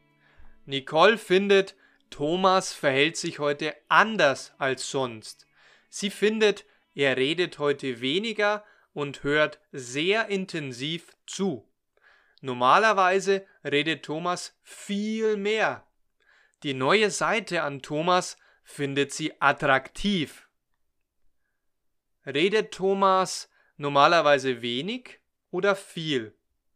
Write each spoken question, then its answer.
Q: Redet Thomas normalerweise wenig oder viel?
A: viel. Normalerweise redet Thomas viel.